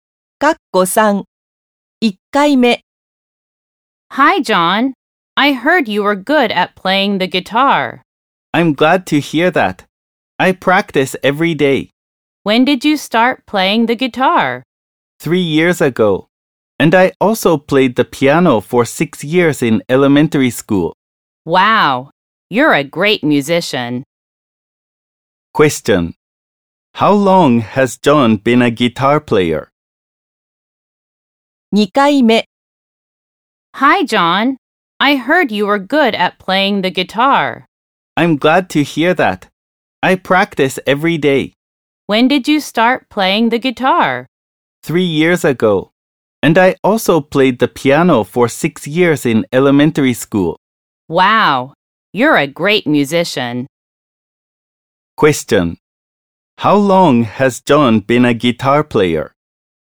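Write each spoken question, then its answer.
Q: How long has John been a guitar player?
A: For three years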